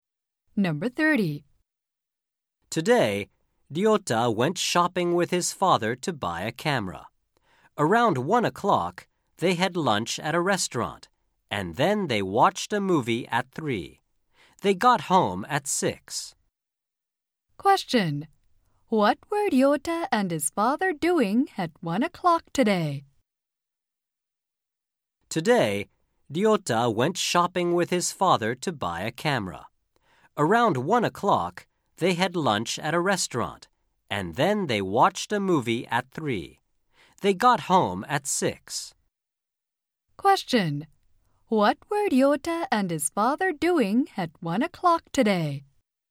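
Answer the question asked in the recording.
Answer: Having lunch at a restaurant.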